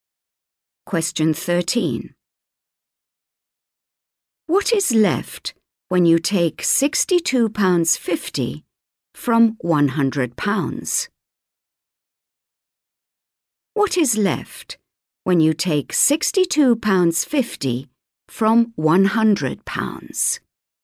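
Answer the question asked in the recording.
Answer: £37.50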